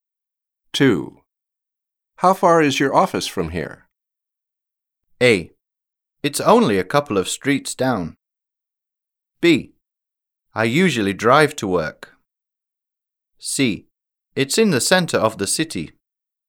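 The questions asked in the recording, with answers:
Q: How far is your office from here?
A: A: It's only a couple of streets down.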